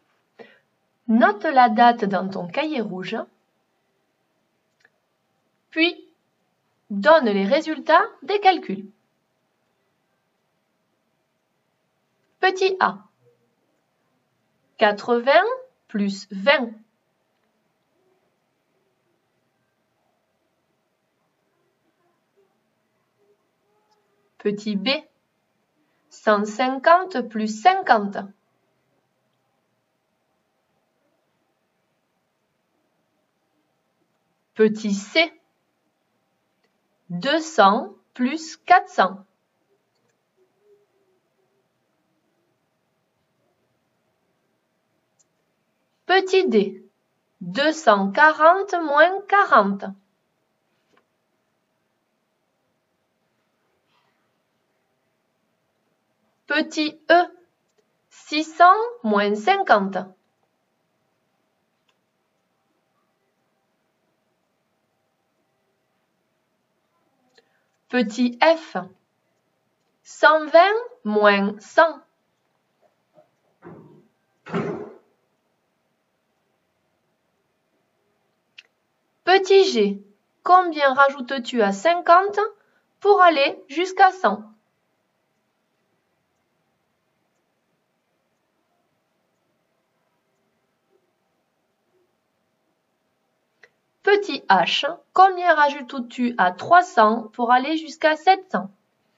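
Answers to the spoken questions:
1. 100
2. 200
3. 600
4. 200
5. 550
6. 20
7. 50
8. 400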